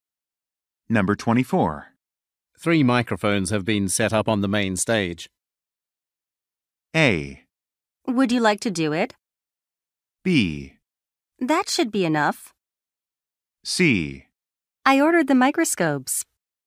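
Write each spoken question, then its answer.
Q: 3 microphones have been set up on the main stage.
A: B: That should be enough.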